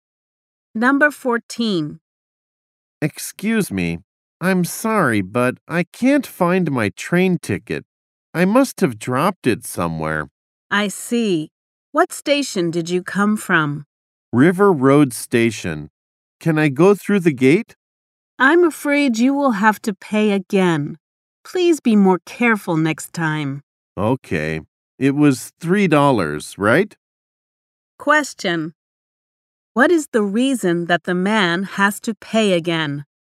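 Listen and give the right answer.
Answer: He lost his train ticket.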